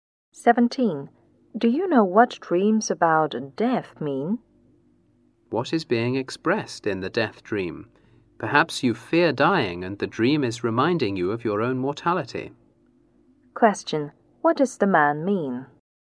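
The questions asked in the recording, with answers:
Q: What does the man mean?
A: The dream may show a fear of dying and remind you that you are mortal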